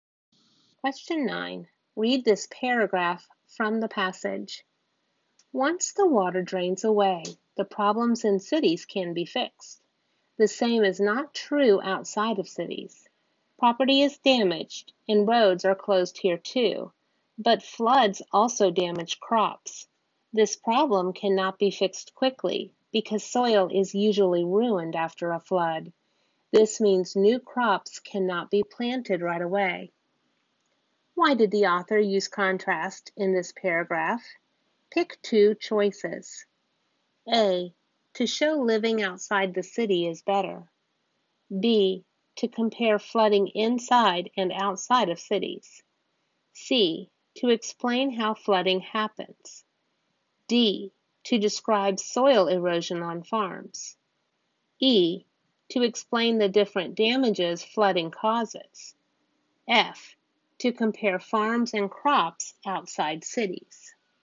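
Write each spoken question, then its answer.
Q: Why did the author use contrast in this paragraph?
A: B: to compare flooding inside and outside of cities; E: to explain the different damages flooding causes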